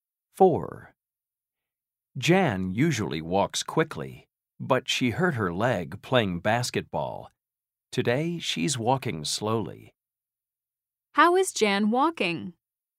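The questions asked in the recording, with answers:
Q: How is Jan walking?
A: slowly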